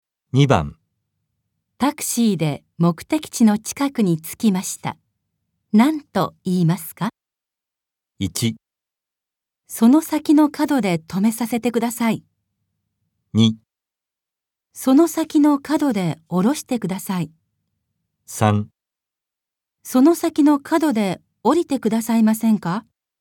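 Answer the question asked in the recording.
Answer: 2: その先の角で降ろしてください。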